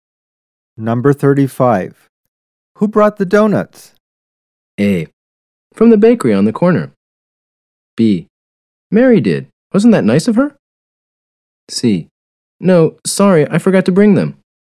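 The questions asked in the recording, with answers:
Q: Who brought the donuts?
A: B: Mary did. Wasn't that nice of her?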